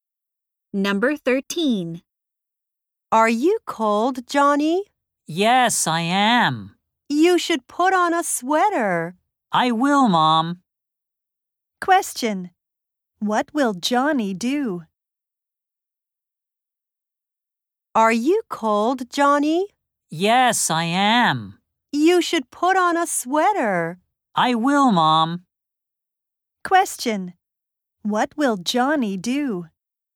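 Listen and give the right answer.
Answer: Put on a sweater.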